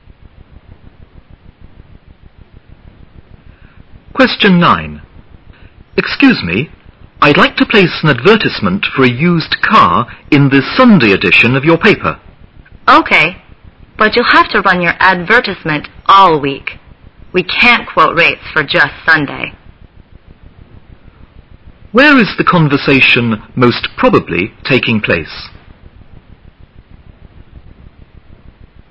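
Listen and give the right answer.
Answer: At a newspaper office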